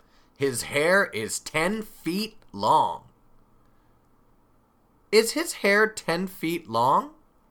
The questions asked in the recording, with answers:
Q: Is his hair 10 feet long?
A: Yes, it is. His hair is 10 feet long.